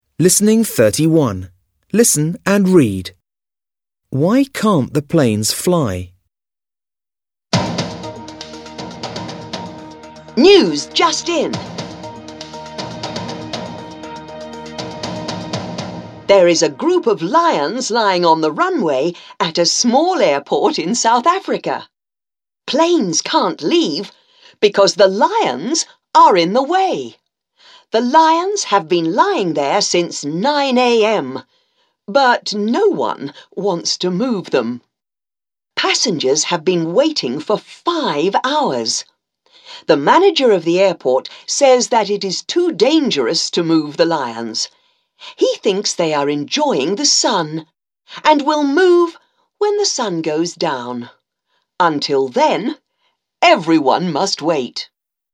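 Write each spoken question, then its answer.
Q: Why can't the planes fly?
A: Because a group of lions is lying on the runway.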